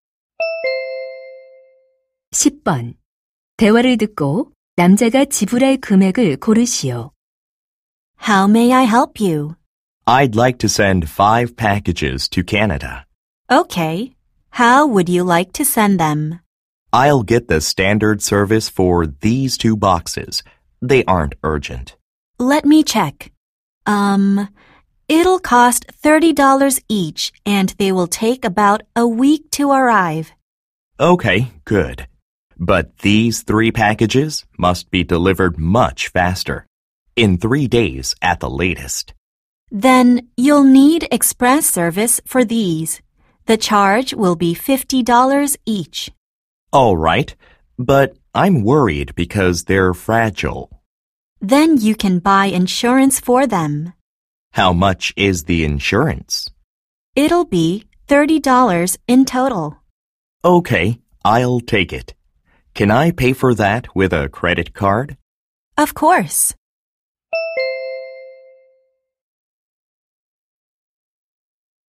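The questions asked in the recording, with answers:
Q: 대화를 듣고 남자가 지불할 금액을 고르시오.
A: $240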